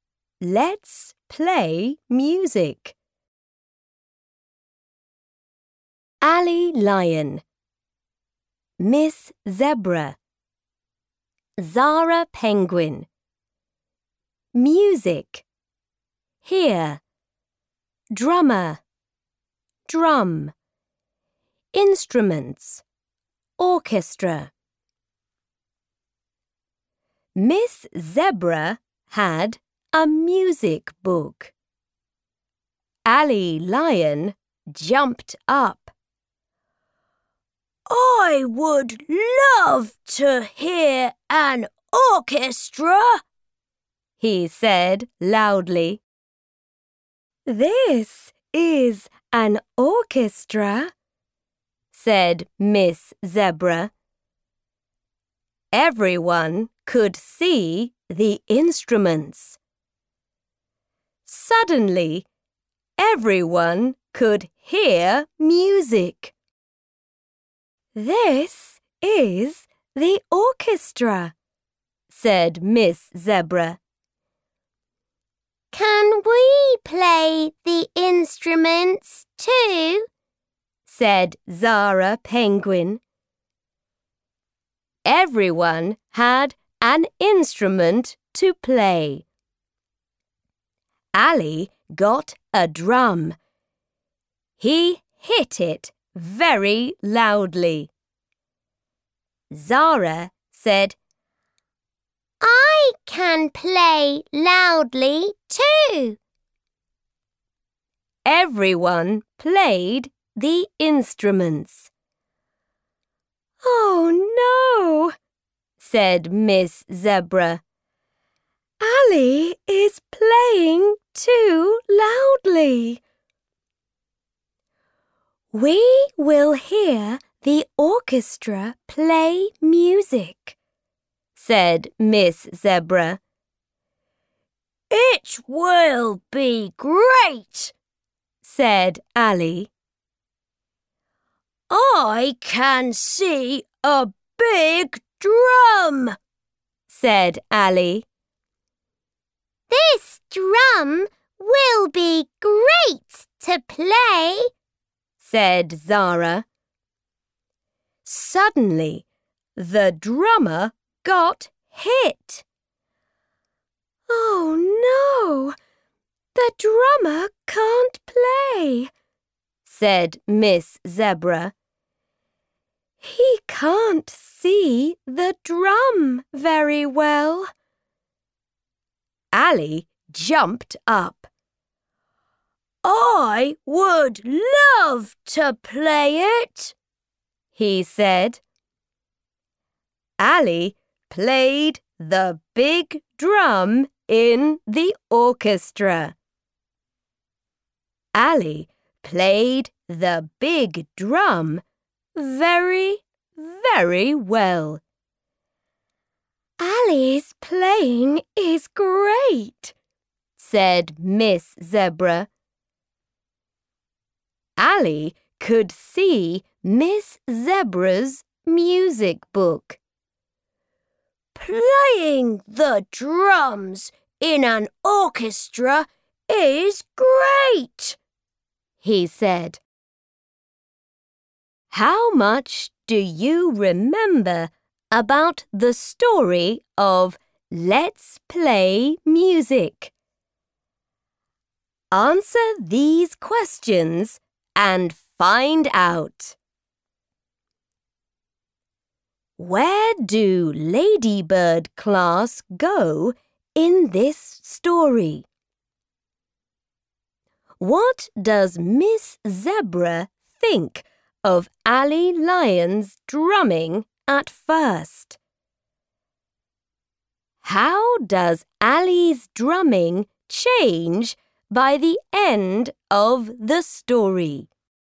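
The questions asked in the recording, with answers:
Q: What does Miss Zebra think of Ali Lion's drumming at first?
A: He is playing too loudly

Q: How does Ali's drumming change by the end of the story?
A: He plays the big drum very well in the orchestra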